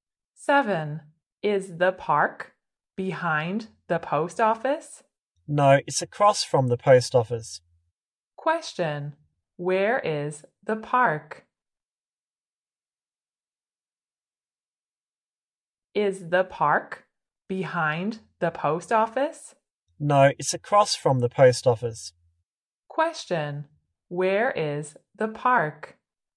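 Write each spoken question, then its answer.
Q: Question, where is the park?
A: Across from the post office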